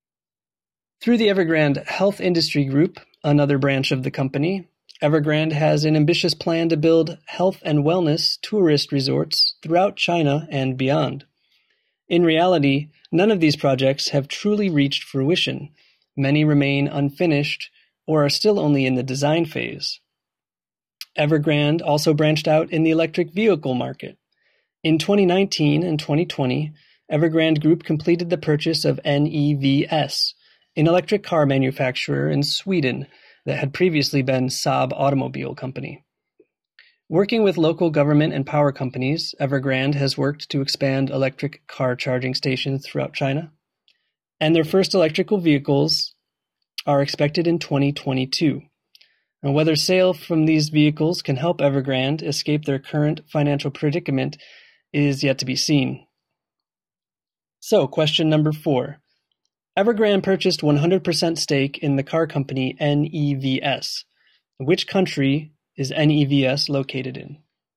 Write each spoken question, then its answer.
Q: Which country is NEVS located in?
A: NEVS is based in Sweden and now also China.